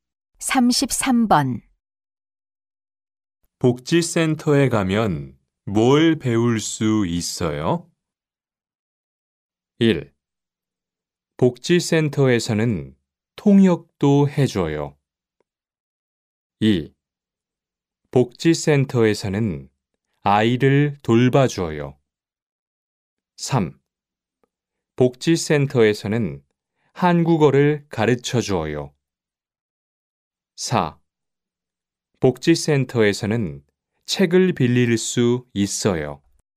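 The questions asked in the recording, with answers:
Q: 복지센터에 가면 뭘 배울 수 있어요?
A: 3: 복지센터에서는 한국어를 가르쳐줘요.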